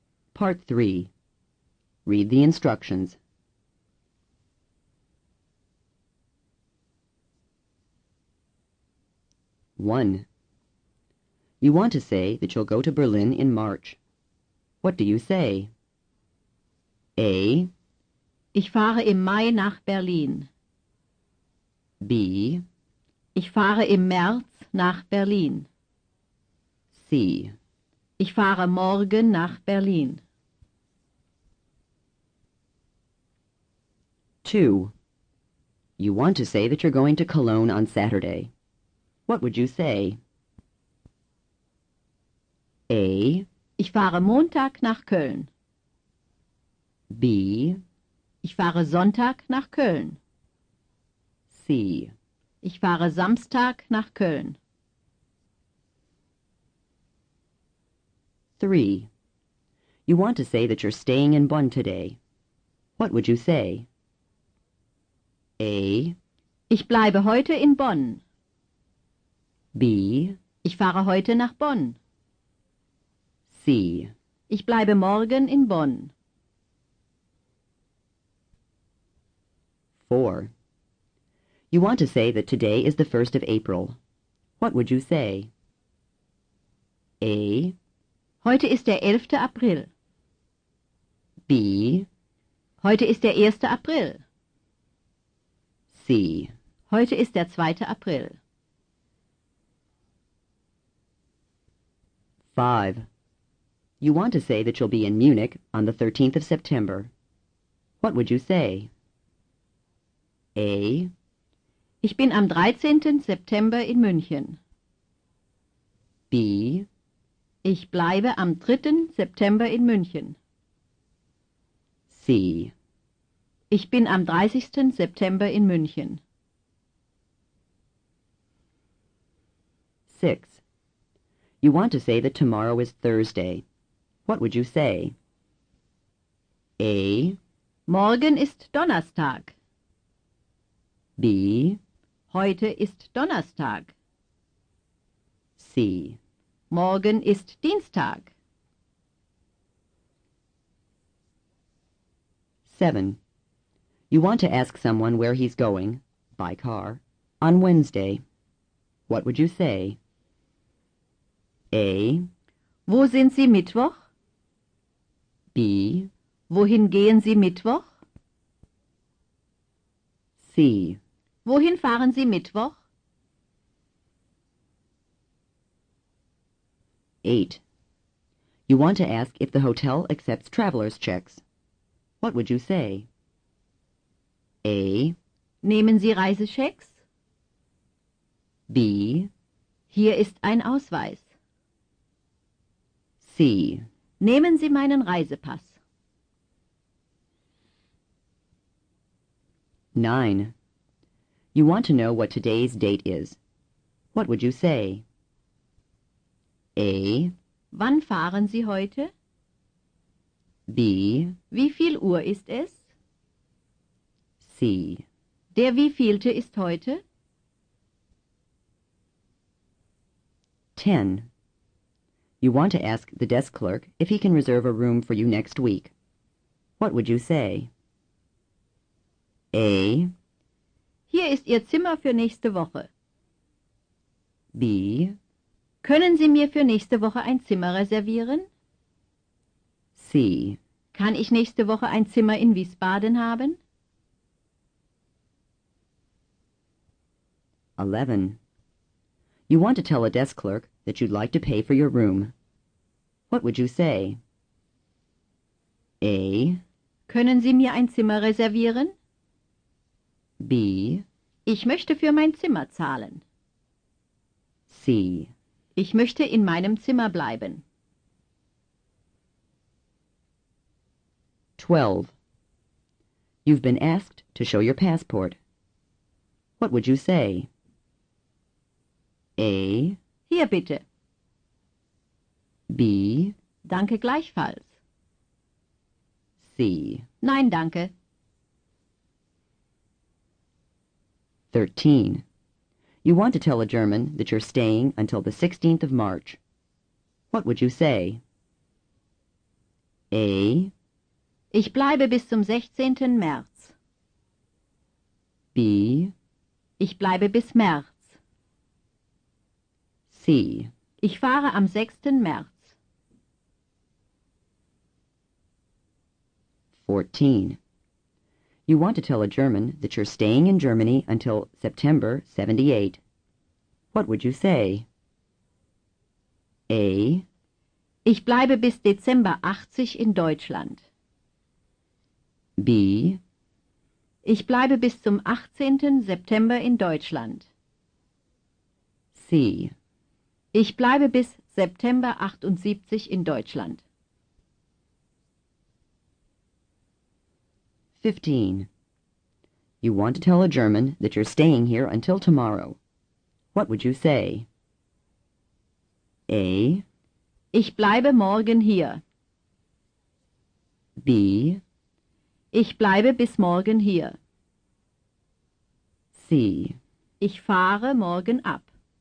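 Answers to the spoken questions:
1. B: Ich fahre im März nach Berlin.
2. C: Ich fahre Samstag nach Köln.
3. A: Ich bleibe heute in Bonn.
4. B: Heute ist der 1. April.
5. A: Ich bin am 13. September in München.
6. A: Morgen ist Donnerstag.
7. C: Wohin fahren Sie Mittwoch?
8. A: Nehmen Sie Reisechecks?
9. C: Der wievielte ist heute?
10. B: Können Sie mir für nächste Woche ein Zimmer reservieren?
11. B: Ich möchte für mein Zimmer zahlen.
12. A: Hier bitte.
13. A: Ich bleibe bis zum 16. März.
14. C: Ich bleibe bis September 78 in Deutschland.
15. B: Ich bleibe bis morgen hier.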